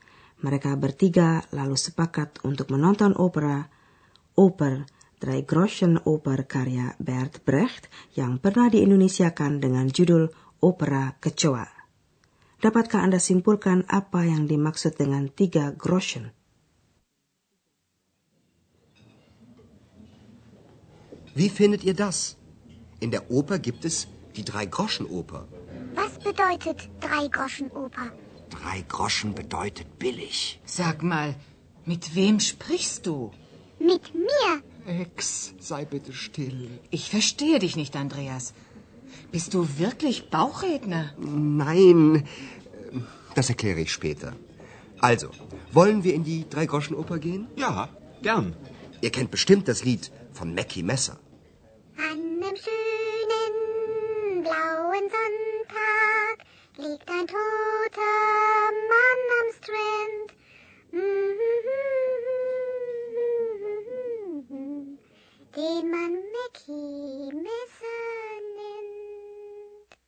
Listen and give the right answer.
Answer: Nah, Anda bisa tangkap bukan arti tiga groschen, yaitu murahan.